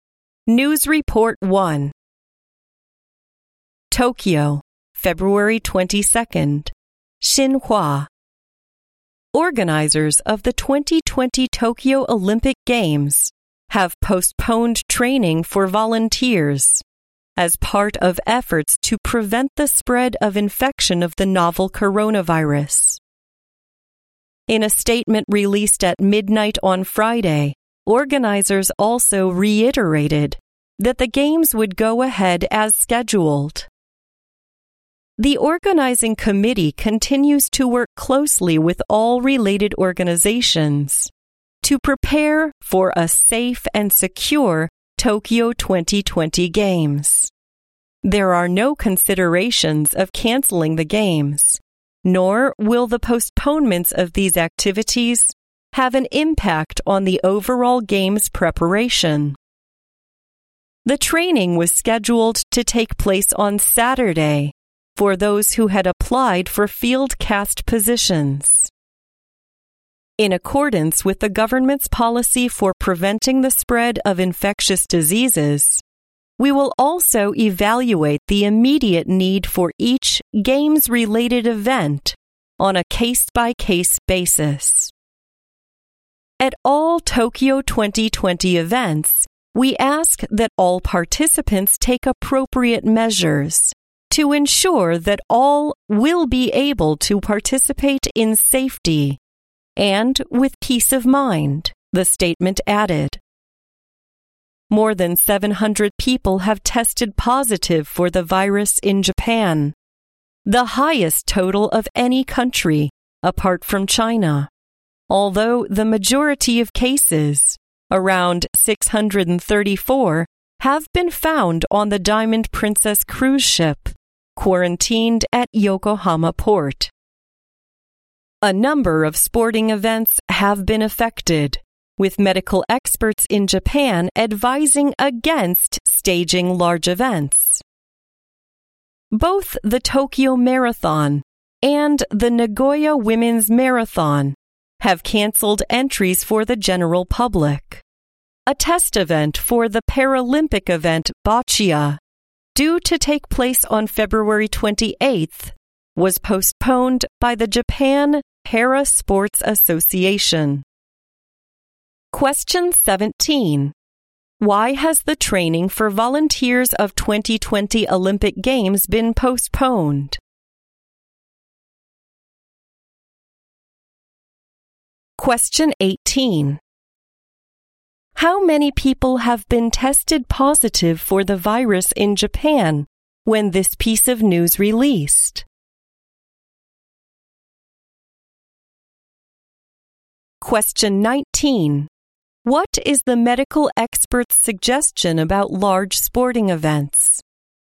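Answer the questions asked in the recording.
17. To prevent the spread of the novel coronavirus
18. More than 700
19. They advise against staging large events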